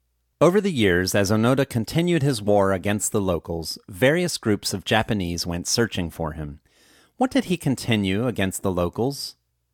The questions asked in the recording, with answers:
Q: What did he continue against the locals?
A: He continued his war against the locals.